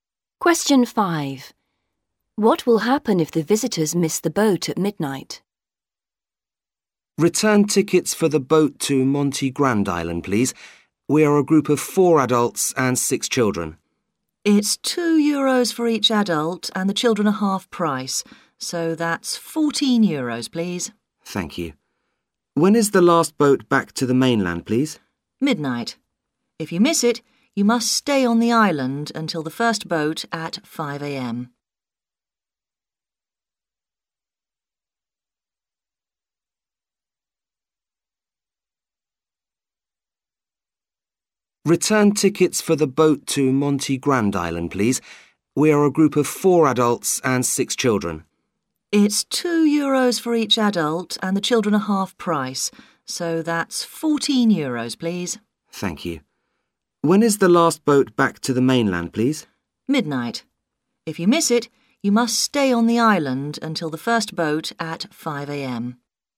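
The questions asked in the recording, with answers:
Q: What will happen if the visitors miss the boat at midnight?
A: They must stay on the island until the first boat at 5 a.m.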